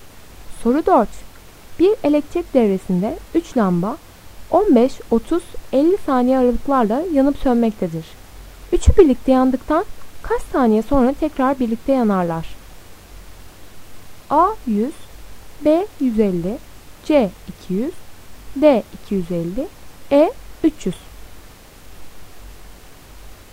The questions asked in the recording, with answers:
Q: Üçü birlikte yandıktan kaç saniye sonra tekrar birlikte yanarlar?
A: Doğru cevap B 150.